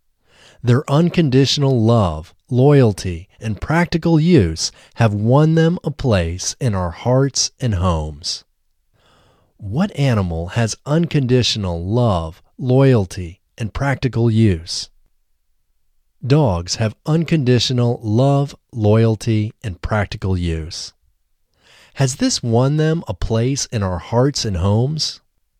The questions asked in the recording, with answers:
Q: Has this won them a place in our hearts and homes?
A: Yes, this has won them a place in our hearts and homes.